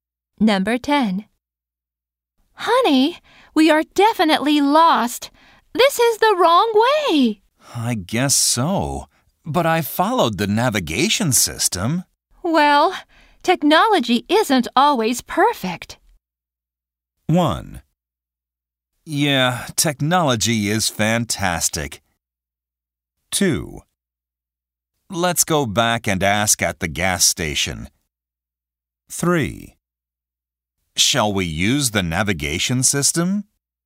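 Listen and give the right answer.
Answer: 2: Let's go back and ask at the gas station.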